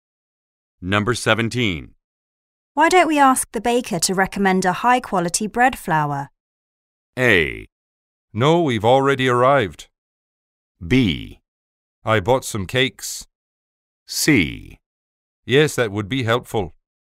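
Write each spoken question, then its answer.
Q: Why don't we ask the baker to recommend a high-quality bread flour?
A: C: Yes, that would be helpful.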